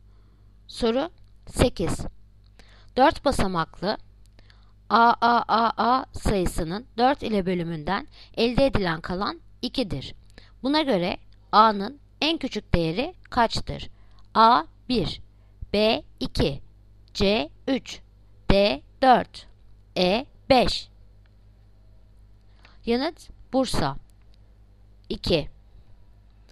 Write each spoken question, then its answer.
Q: Buna göre A'nın en küçük değeri kaçtır?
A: Yanıt Bursa 2.